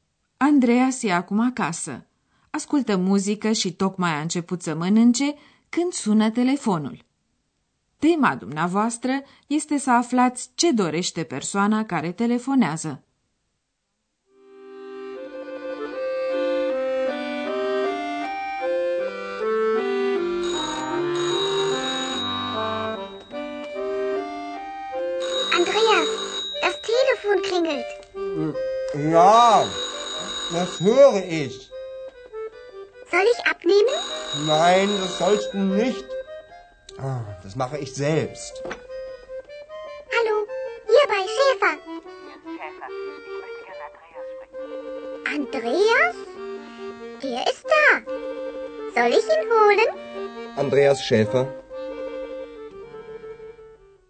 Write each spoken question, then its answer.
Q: Tema dumneavoastră este să aflați ce dorește persoana care telefonează.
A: Femeia care telefonează vrea să vorbească cu Andreas.